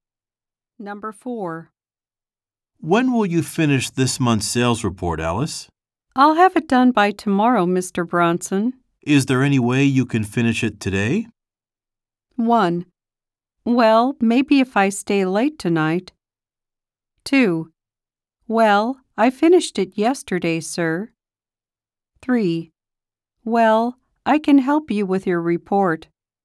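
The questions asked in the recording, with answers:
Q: Is there any way you can finish it today?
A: 1: Well, maybe if I stay late tonight.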